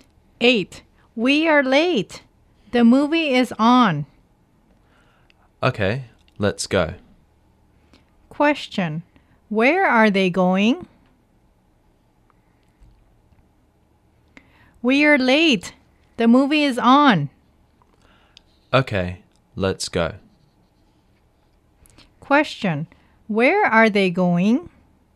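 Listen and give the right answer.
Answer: To the movies (movie theater).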